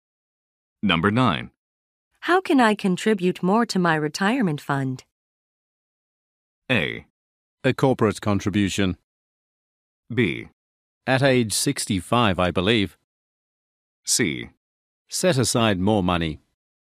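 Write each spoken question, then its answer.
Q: How can I contribute more to my retirement fund?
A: C: Set aside more money.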